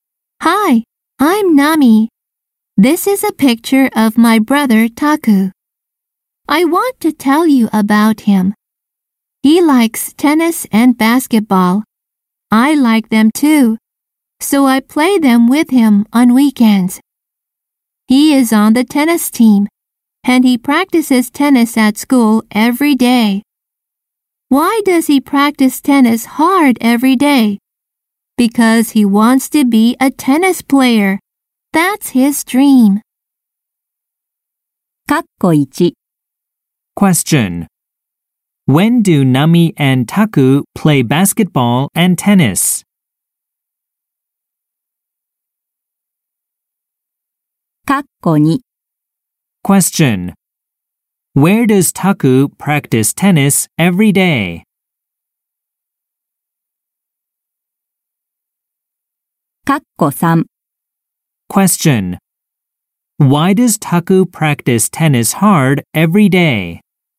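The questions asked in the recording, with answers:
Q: When do Nami and Taku play basketball and tennis?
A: On weekends

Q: Where does Taku practice tennis every day?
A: At school

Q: Why does Taku practice tennis hard every day?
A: Because he wants to be a tennis player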